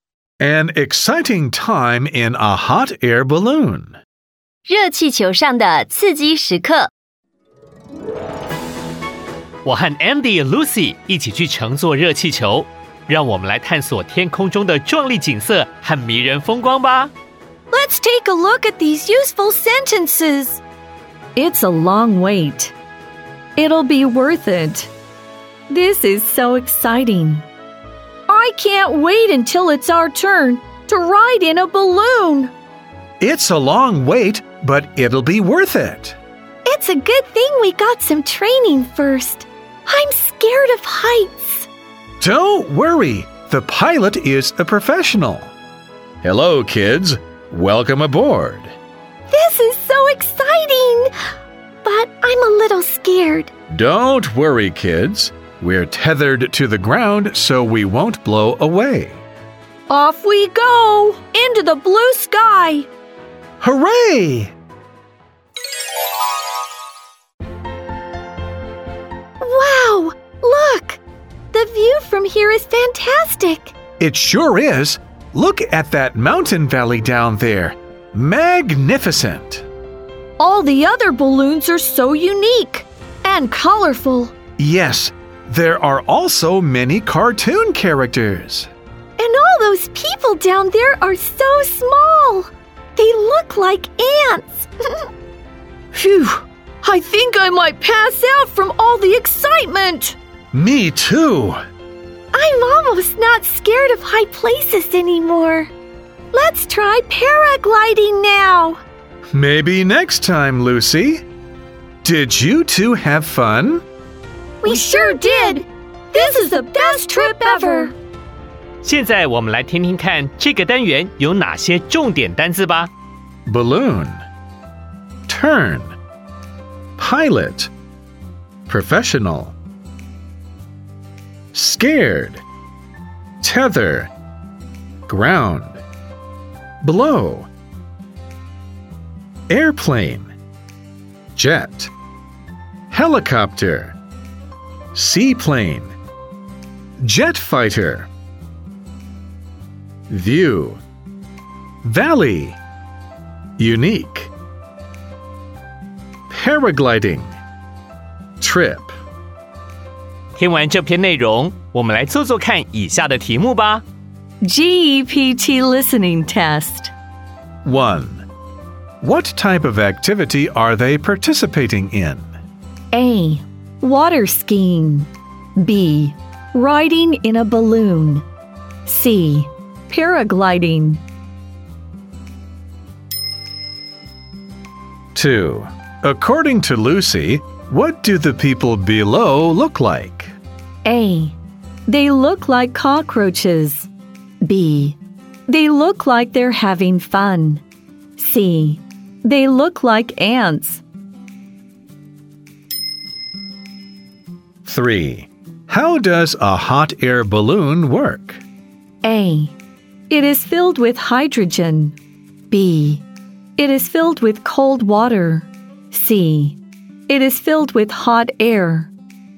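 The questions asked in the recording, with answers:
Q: What type of activity are they participating in?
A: B: Riding in a balloon.

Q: According to Lucy, what do the people below look like?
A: C: They look like ants.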